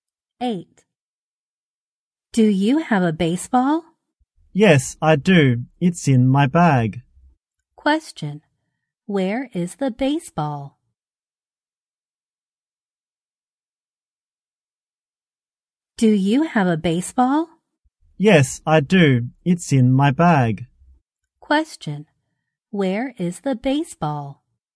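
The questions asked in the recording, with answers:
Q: Where is the baseball?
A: In the bag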